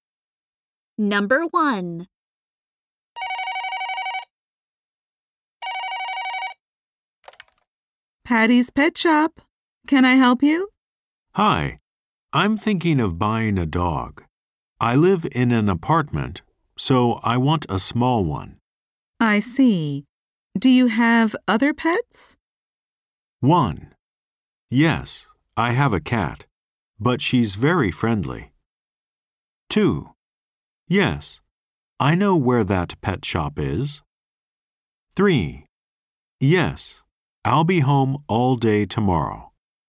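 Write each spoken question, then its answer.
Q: I see. Do you have other pets?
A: 1: Yes, I have a cat, but she's very friendly.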